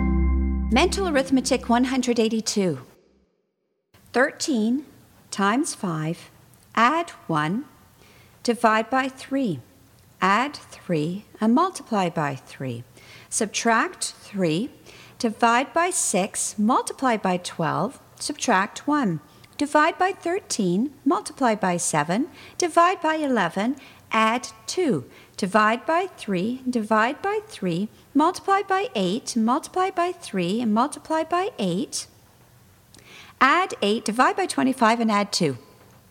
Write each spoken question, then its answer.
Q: 13 times 5, add 1, divide by 3, add 3, and multiply by 3. Subtract 3, divide by 6, multiply by 12, subtract 1. Divide by 13, multiply by 7, divide by 11, add 2. Divide by 3, divide by 3, multiply by 8, multiply by 3, and multiply by 8. Add 8, divide by 25, and add 2.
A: And the answer is 10.